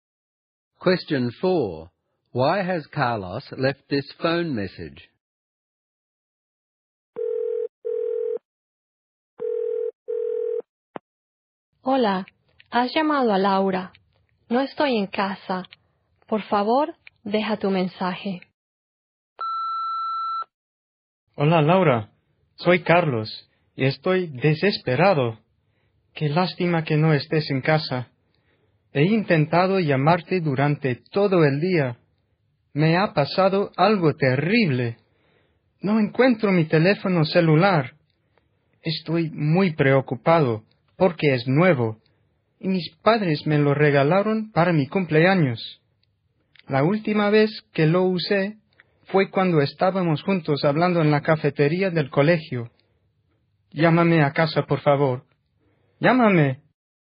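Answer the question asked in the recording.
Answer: He has lost his new mobile phone, which was a birthday present from his parents. He last used it with Laura in the school cafeteria, and he wants her to call him.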